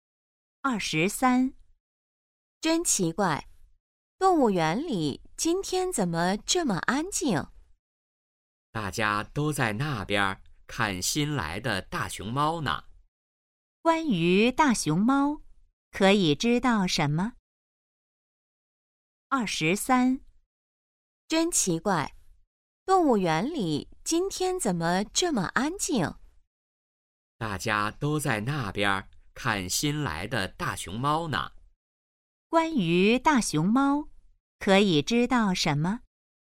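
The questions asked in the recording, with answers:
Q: 关于大熊猫,可以知道什么?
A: 是新来的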